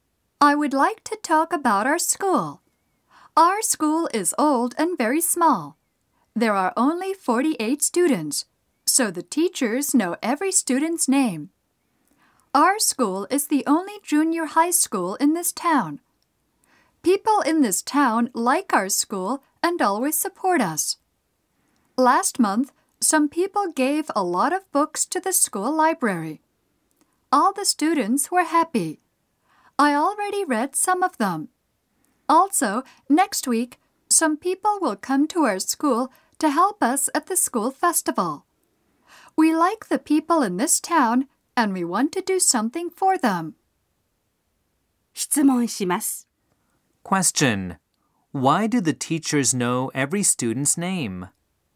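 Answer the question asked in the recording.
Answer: Because there are only 48 students.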